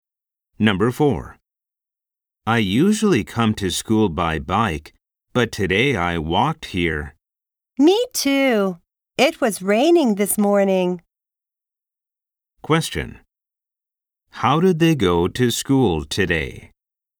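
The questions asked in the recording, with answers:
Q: How did they go to school today?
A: They walked (on foot).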